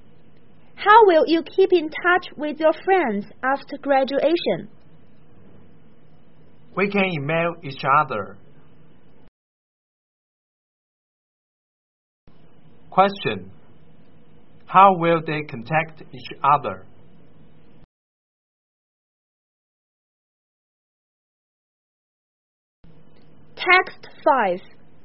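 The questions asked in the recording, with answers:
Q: How will they contact each other?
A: By email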